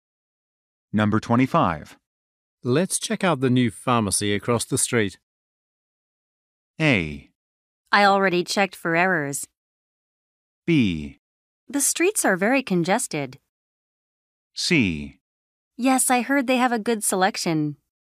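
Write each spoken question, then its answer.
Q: Let's check out the new pharmacy across the street.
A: C: Yes, I heard they have a good selection.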